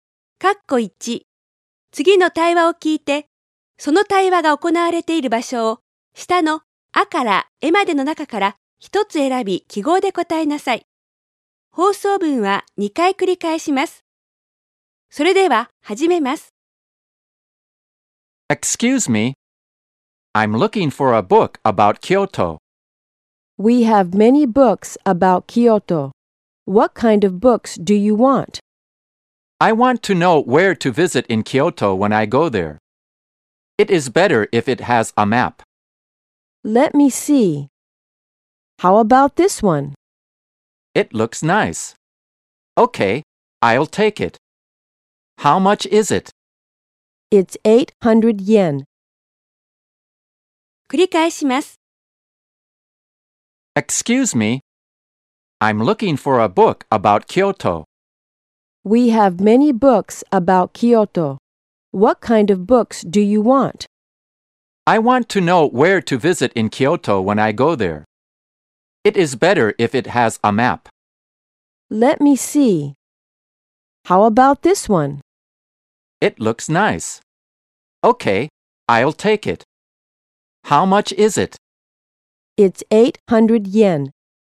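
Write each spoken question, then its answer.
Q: 次の対話を聞いて、その対話が行われている場所を下のあからえまでの中から一つ選び記号で答えなさい。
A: 書店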